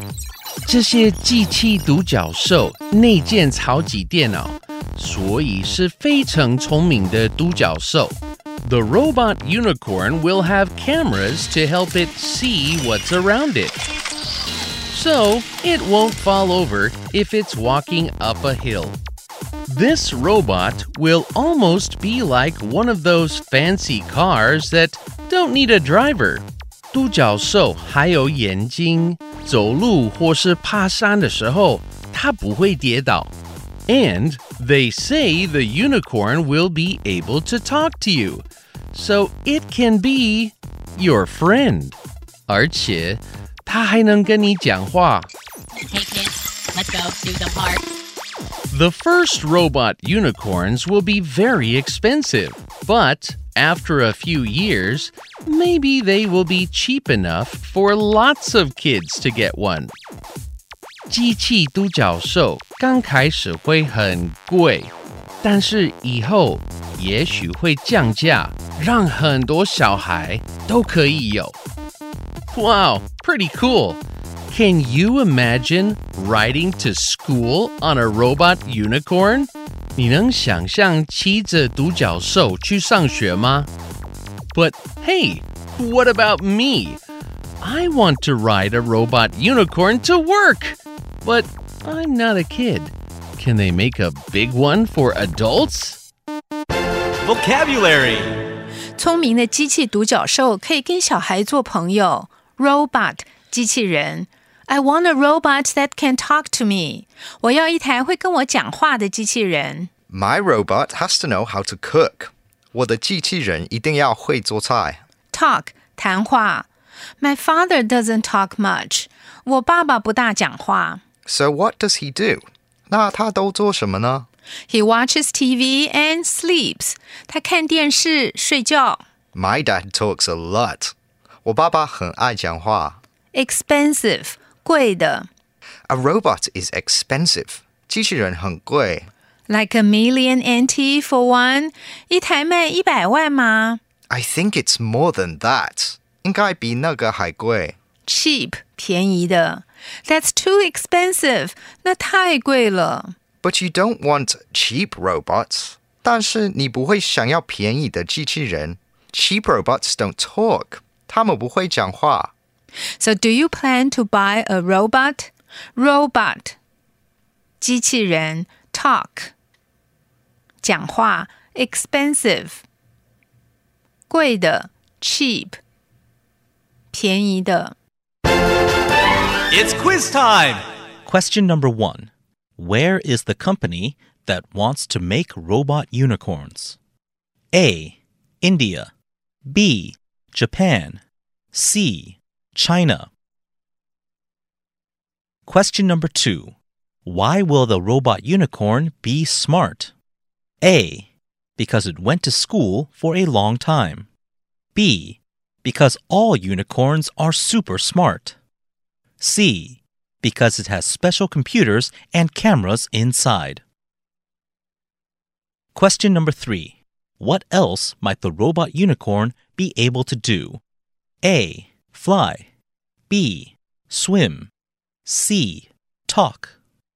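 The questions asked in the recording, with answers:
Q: Why will the robot unicorn be smart?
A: C: Because it has special computers and cameras inside.

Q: What else might the robot unicorn be able to do?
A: C: Talk.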